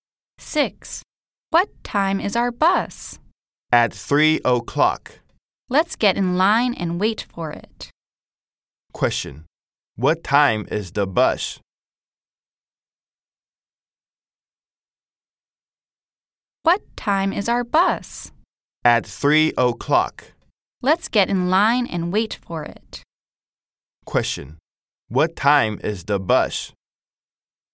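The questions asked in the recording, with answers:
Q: Question. What time is the bus?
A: 3 o'clock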